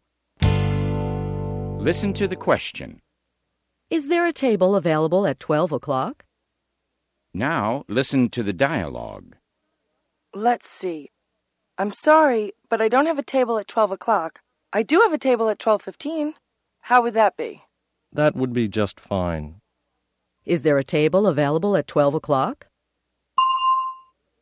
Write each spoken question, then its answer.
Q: Is there a table available at 12 o'clock?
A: No, there isn't a table available at 12 o'clock, but there is one available at 12:15.